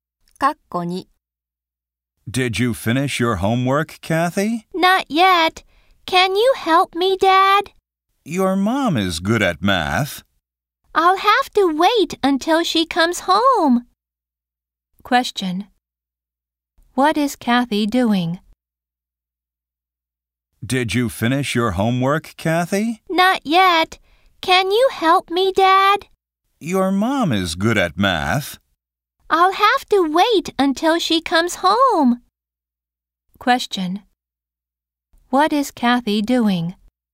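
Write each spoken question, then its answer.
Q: What is Kathy doing?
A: Her math homework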